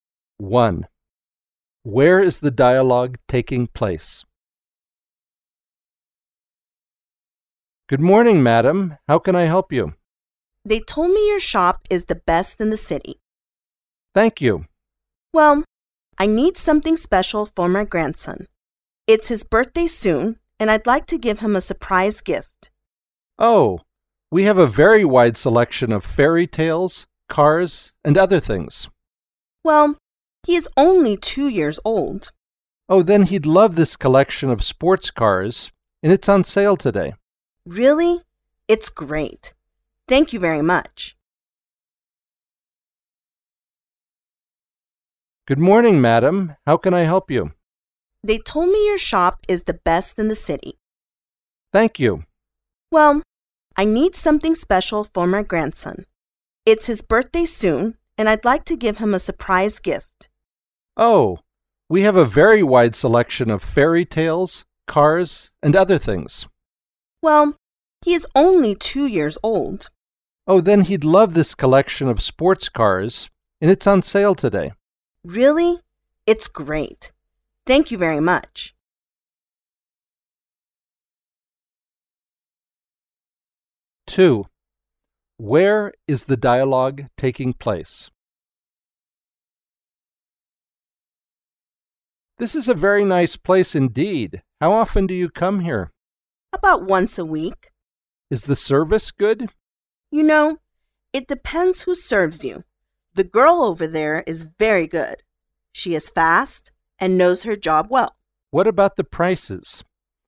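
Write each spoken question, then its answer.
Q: Where is the dialogue taking place?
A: In a restaurant (café)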